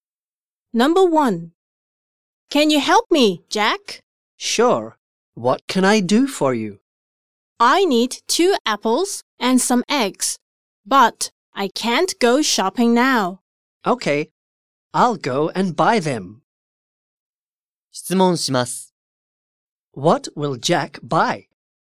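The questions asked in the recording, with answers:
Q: What will Jack buy?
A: Two apples and some eggs.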